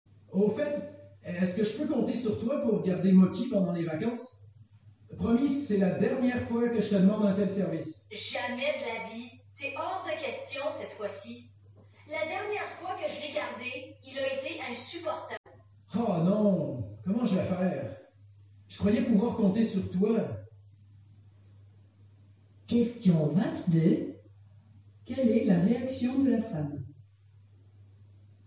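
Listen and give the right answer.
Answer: Elle refuse catégoriquement de garder Moki.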